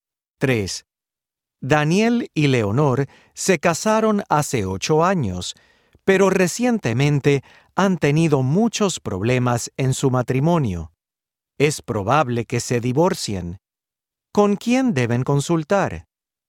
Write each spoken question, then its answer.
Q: ¿Con quién deben consultar?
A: Deben consultar con una consejera matrimonial.